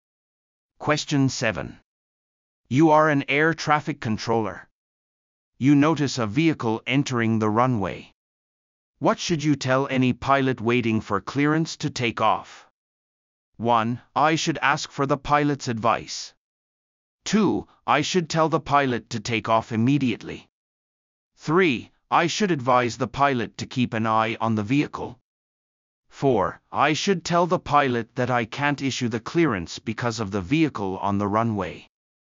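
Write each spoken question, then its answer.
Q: What should you tell any pilot waiting for clearance to take off?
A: 4: I should tell the pilot that I can't issue the clearance because of the vehicle on the runway.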